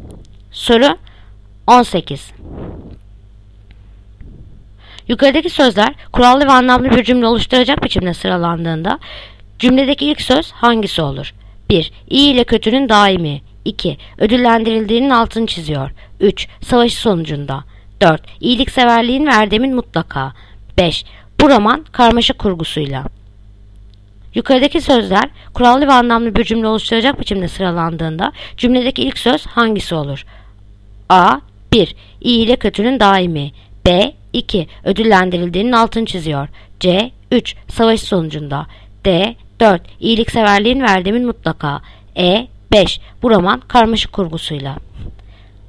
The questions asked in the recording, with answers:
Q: Yukarıdaki sözler kurallı ve anlamlı bir cümle oluşturacak biçimde sıralandığında cümledeki ilk söz hangisi olur?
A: Yanıt Edirne. 5. Bu roman karmaşık kurgusuyla.